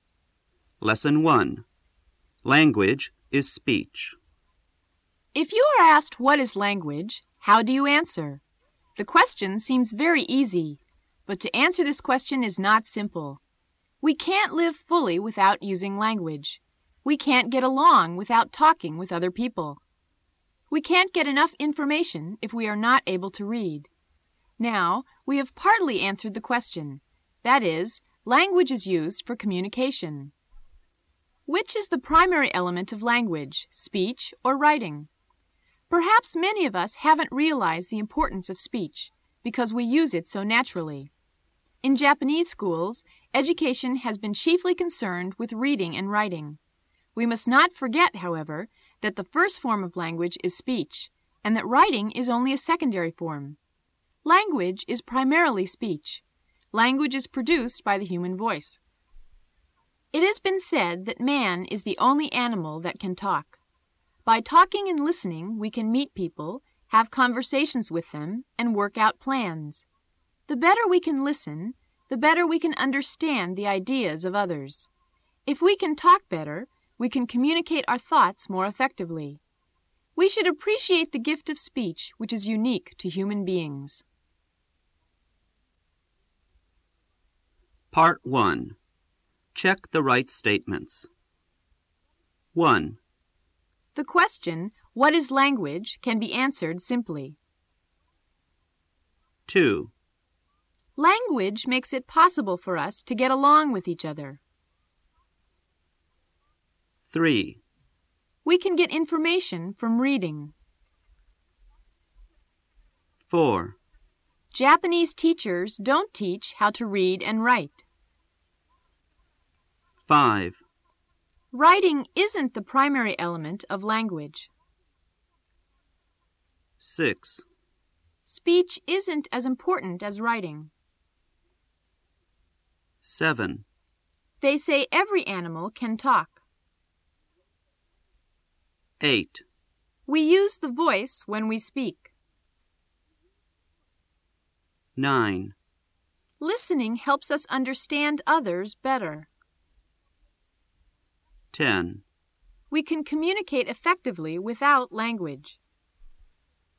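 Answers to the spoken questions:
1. False
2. True
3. True
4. False
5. True
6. False
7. False
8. True
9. True
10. False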